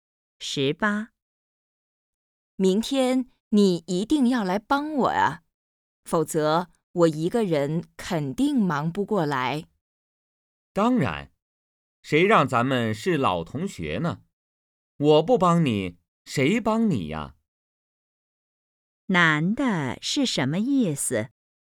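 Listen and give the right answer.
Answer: 一定会帮忙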